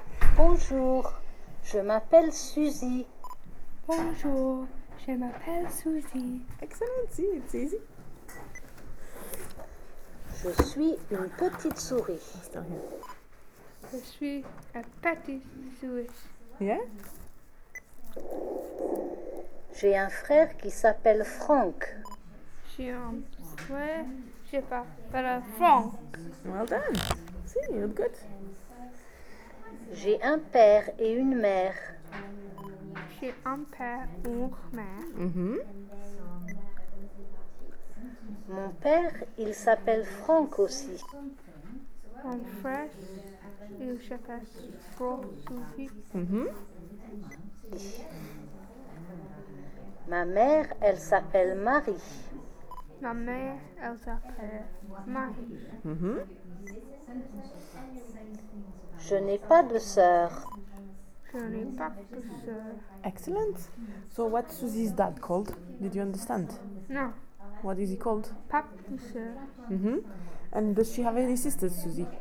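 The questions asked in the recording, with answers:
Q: So what's Susie's dad called?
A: Franck

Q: And does she have any sisters, Susie?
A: No, she has no sisters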